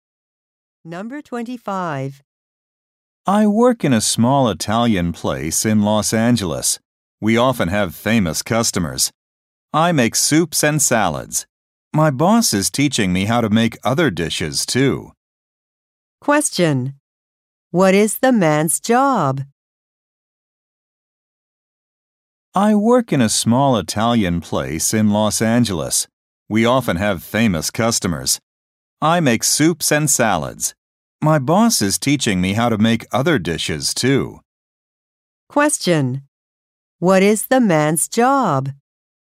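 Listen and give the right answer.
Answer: He is a cook at an Italian restaurant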